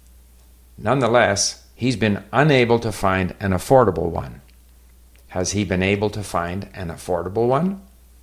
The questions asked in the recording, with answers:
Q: Has he been able to find an affordable one?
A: No, he's been unable to find an affordable one.